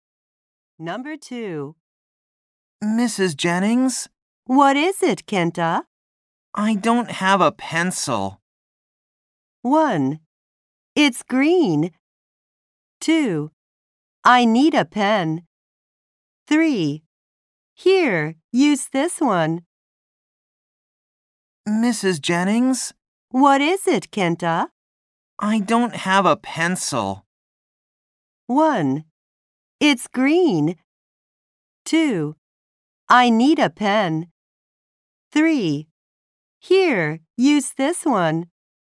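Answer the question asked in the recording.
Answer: 3: Here, use this one.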